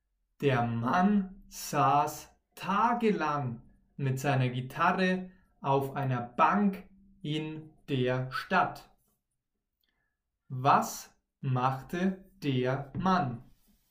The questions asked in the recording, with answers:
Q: Was machte der Mann?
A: Er saß tagelang mit seiner Gitarre auf einer Bank in der Stadt.